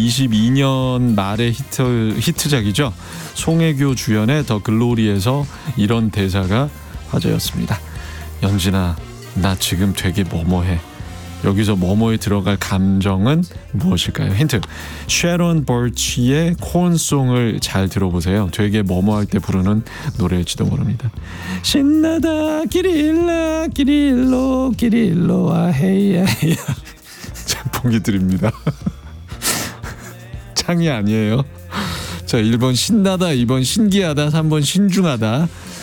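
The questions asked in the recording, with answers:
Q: 연진아, 나 지금 되게 뭐뭐해. 여기서 뭐뭐에 들어갈 감정은 무엇일까요?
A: 1번: 신나다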